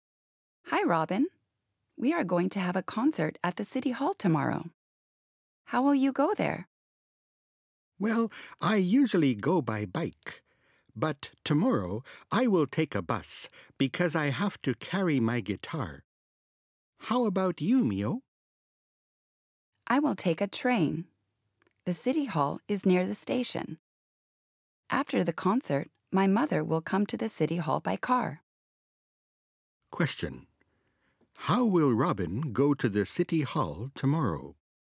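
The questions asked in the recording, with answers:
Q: How will Robin go to the City Hall tomorrow?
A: By bus.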